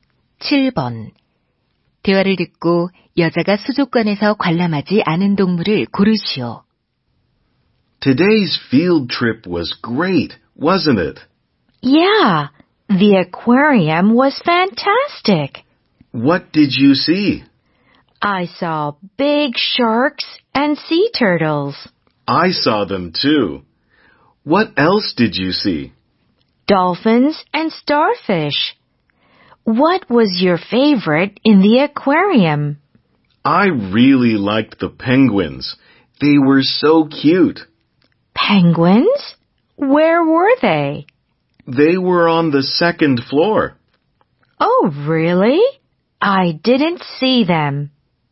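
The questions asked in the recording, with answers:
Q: 대화를 듣고 여자가 수족관에서 관람하지 않은 동물을 고르시오.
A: 펭귄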